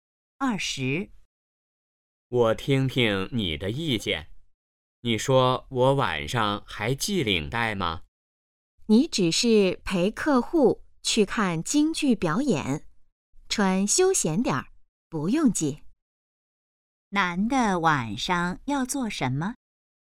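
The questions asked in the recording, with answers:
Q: 男的晚上要做什么?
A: 陪客户看京剧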